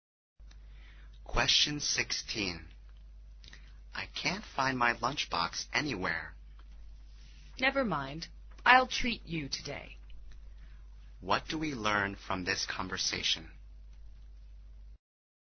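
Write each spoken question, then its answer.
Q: What do we learn from this conversation?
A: The speaker can't find the lunchbox, so the other will pay for lunch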